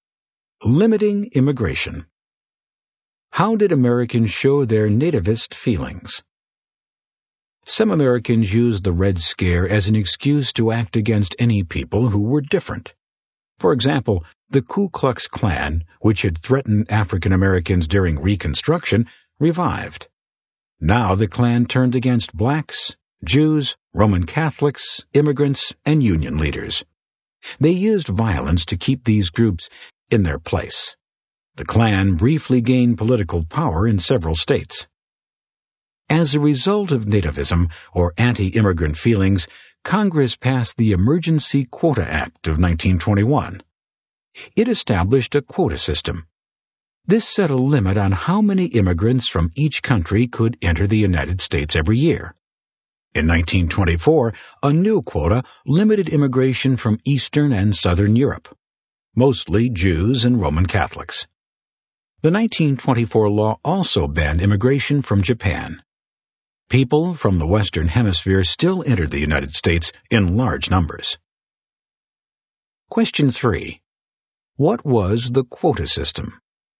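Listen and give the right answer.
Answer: A limit on how many immigrants from each country could enter the US each year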